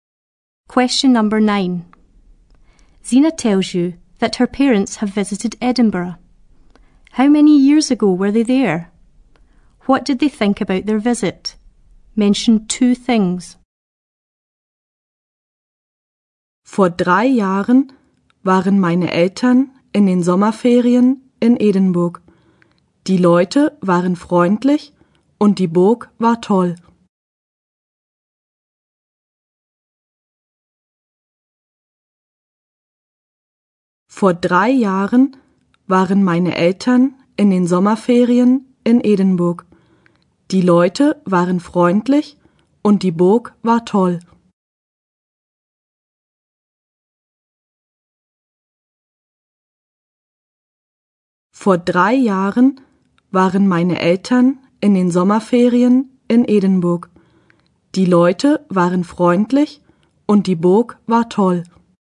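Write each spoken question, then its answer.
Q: How many years ago were they there?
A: 3 years ago

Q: What did they think about their visit?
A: The people were friendly and the castle was great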